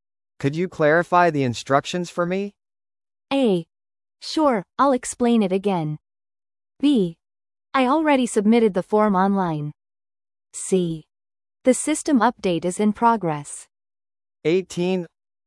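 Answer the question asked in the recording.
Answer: A: Sure, I'll explain it again.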